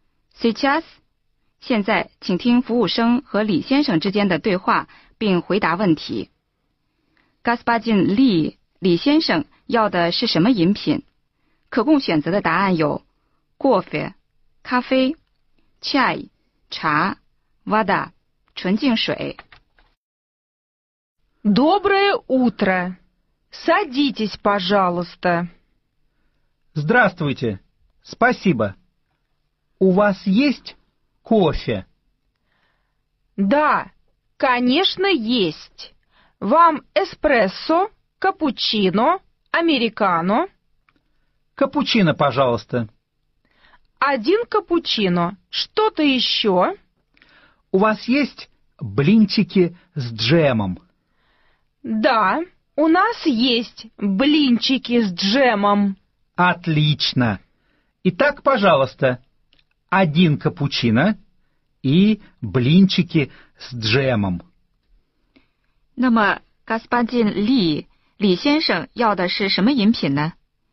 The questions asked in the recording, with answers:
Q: Gaspadin Li, 李先生要的是什么饮品?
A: 正确的答案是 кофе, 咖啡.